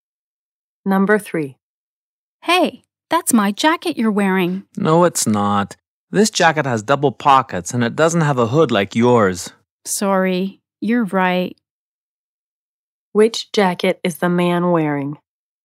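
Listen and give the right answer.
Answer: A jacket with double pockets and no hood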